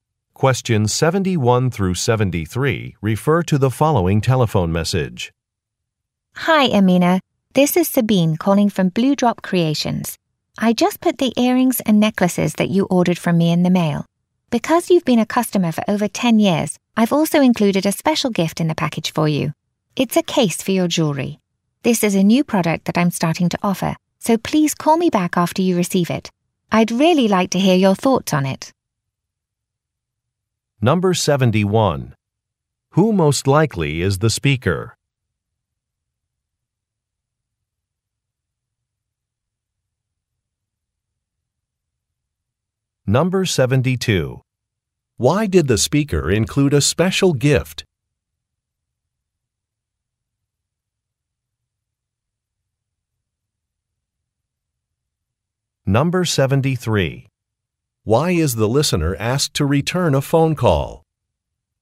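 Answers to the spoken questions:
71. A jewelry maker
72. The listener has been a customer for over 10 years
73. To give feedback on a new product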